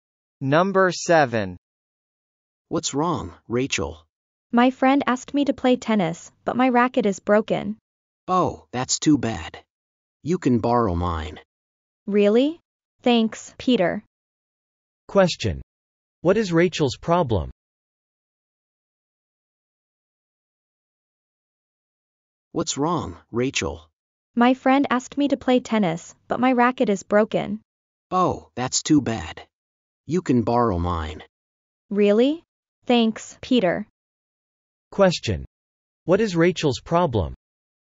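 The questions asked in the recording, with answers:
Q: Question. What is Rachel's problem?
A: Her tennis racket is broken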